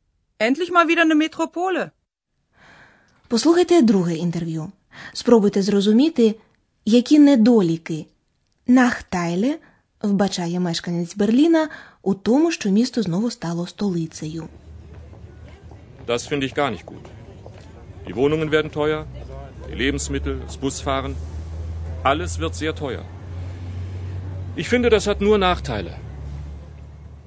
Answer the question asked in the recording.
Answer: Отже, на думку цього берлінця, основний недолік об'єднання міста полягає в тому, що все дорожчає.